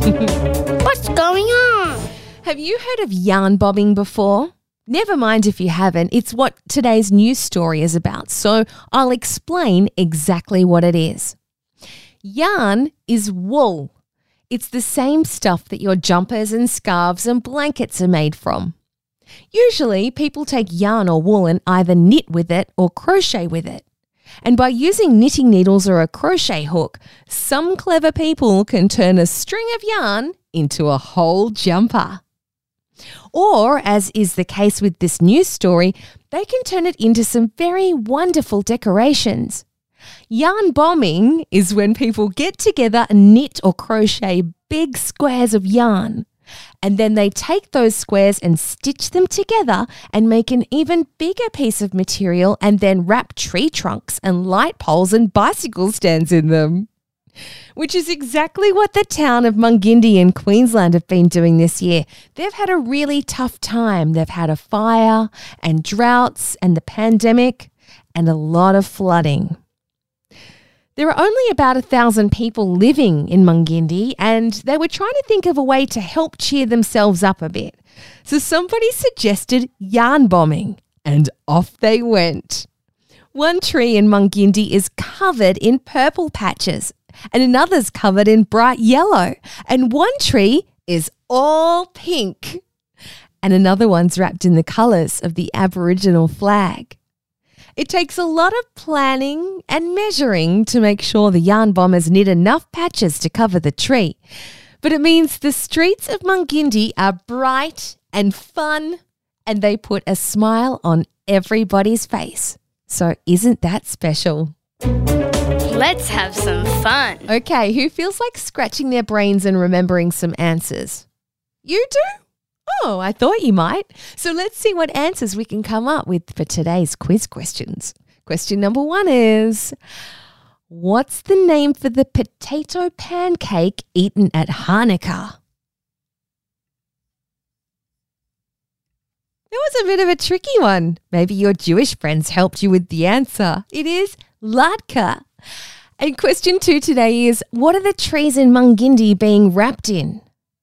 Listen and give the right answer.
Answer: Yes, it's yarn or wool, like a big, woolly, colourful jumper.